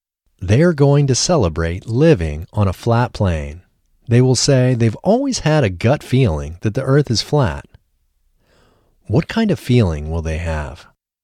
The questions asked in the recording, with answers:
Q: What kind of feeling will they have?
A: They will have a gut feeling that the earth is flat.